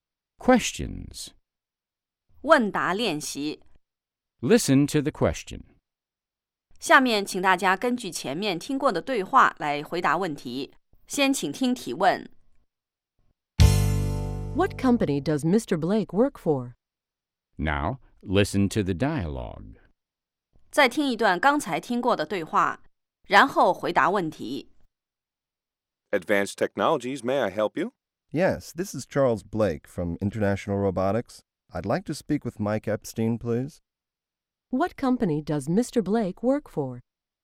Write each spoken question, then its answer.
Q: What company does Mr. Blake work for?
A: He works for International Robotics.